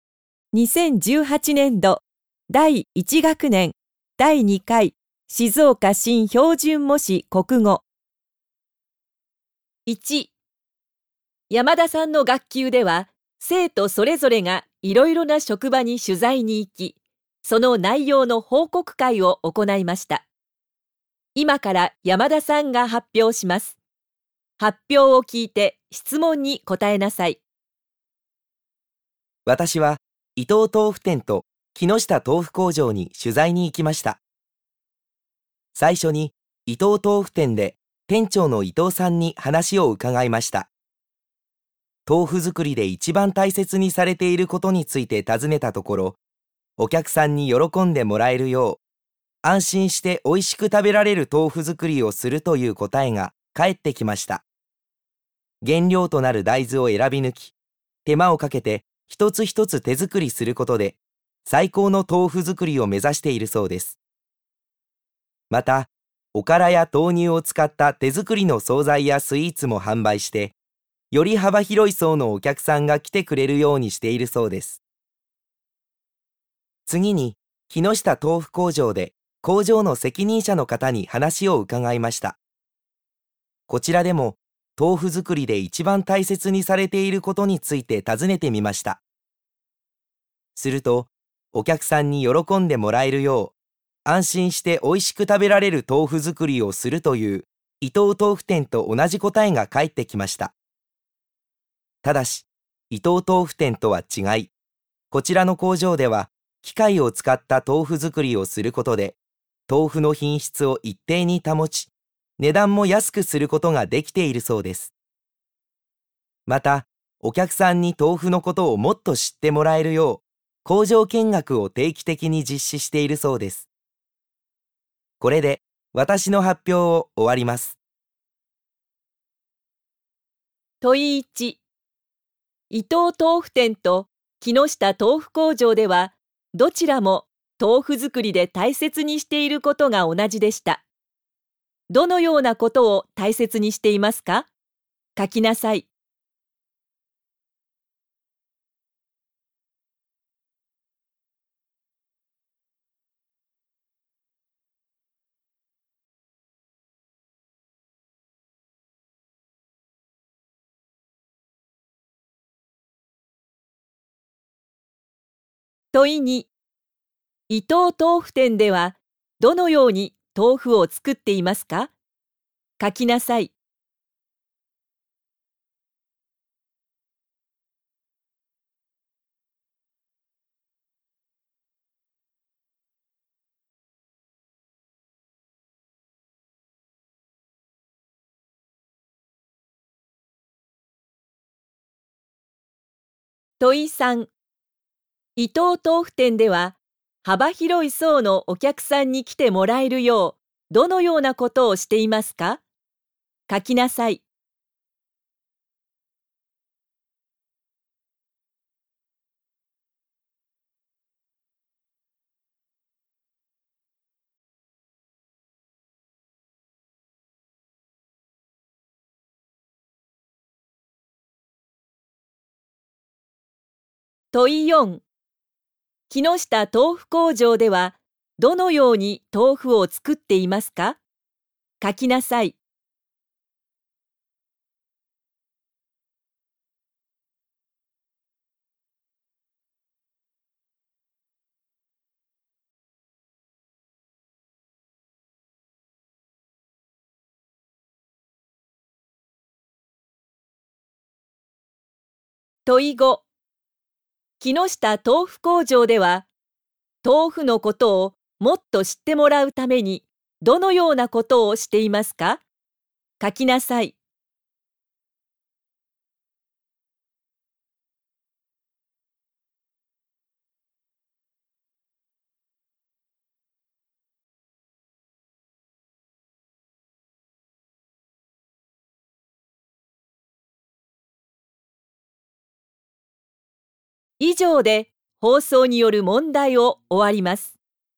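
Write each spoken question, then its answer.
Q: 伊藤豆腐店と木下豆腐工場では、どちらも豆腐作りで大切にしていることが同じでした。どのようなことを大切にしていますか?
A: お客さんに喜んでもらえるよう、安心しておいしく食べられる豆腐作りをすること

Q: 伊藤豆腐店ではどのように豆腐を作っていますか?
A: 原料の大豆を選び抜き、手間をかけて一つ一つ手作りしている

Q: 伊藤豆腐店では幅広い層のお客さんに来てもらえるよう、どのようなことをしていますか?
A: おからや豆乳を使った手作りの惣菜やスイーツを販売している

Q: 木下豆腐工場ではどのように豆腐を作っていますか?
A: 機械を使って作り、品質を一定に保ち値段を安くしている

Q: 木下豆腐工場では、豆腐のことをもっと知ってもらうために、どのようなことをしていますか?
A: 工場見学を定期的に実施している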